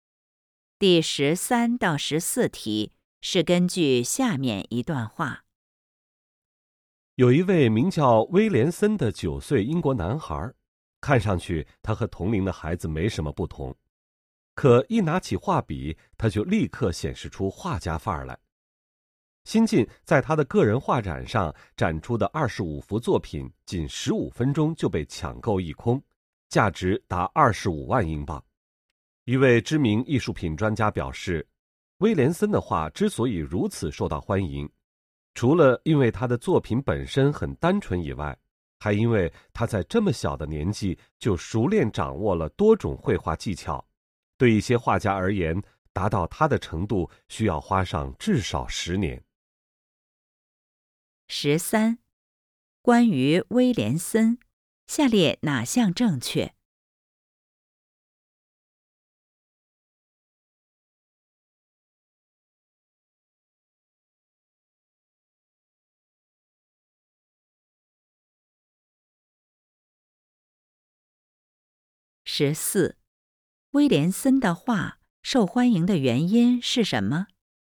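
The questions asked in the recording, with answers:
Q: 威廉森的画受欢迎的原因是什么?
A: 作品单纯,且小小年纪就熟练掌握多种绘画技巧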